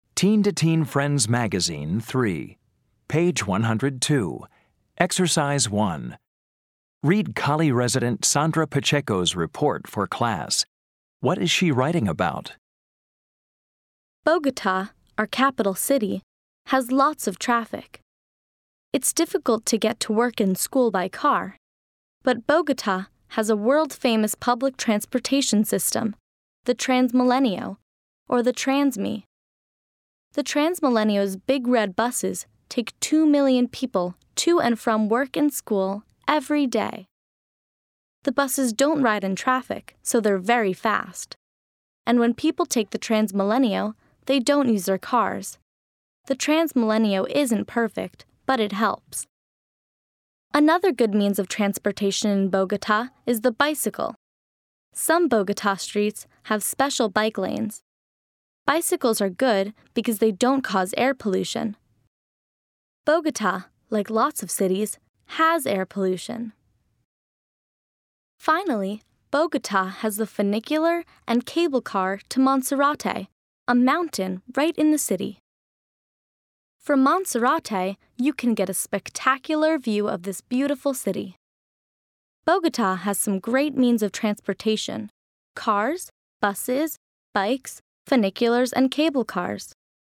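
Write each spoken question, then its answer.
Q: What is she writing about?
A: Means of transportation in Bogota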